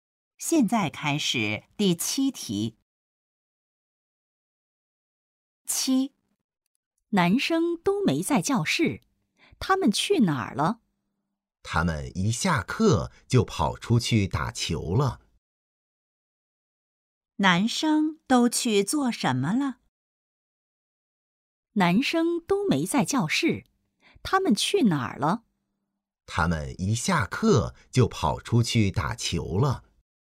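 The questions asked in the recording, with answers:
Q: 男生都去做什么了?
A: 打球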